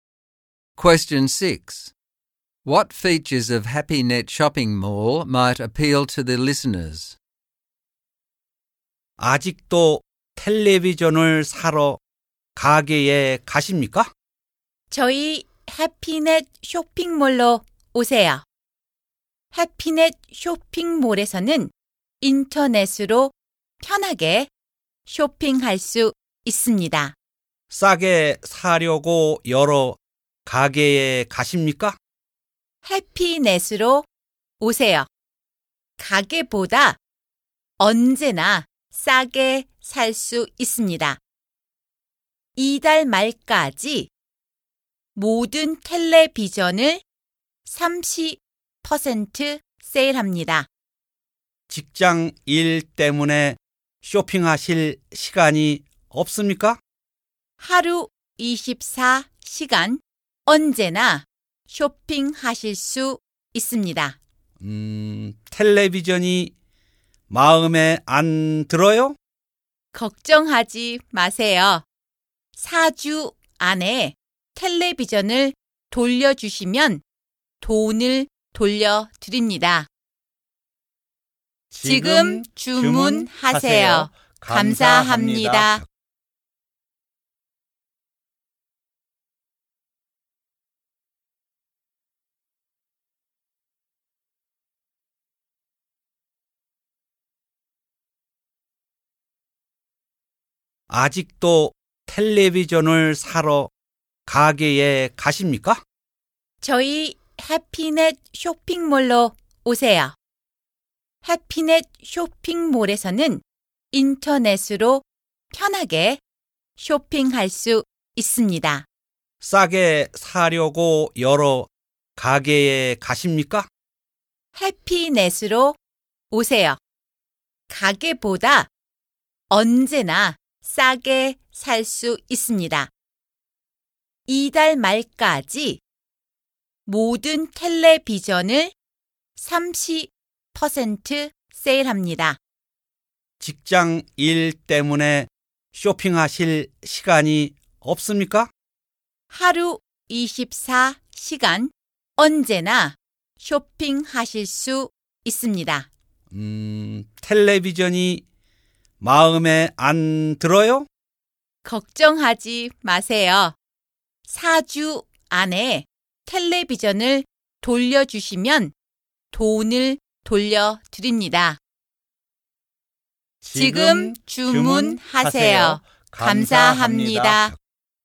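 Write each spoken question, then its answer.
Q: What features of HappyNet Shopping Mall might appeal to the listeners?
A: Convenient online shopping, prices always cheaper than in shops, 30% off all TVs until the end of the month, shopping 24 hours a day, and a money-back refund if the TV is returned within 4 weeks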